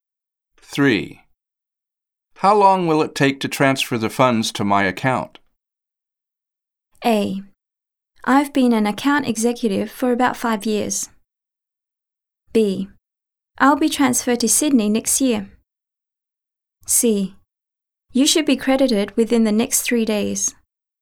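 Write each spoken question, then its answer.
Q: How long will it take to transfer the funds to my account?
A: C: You should be credited within the next 3 days.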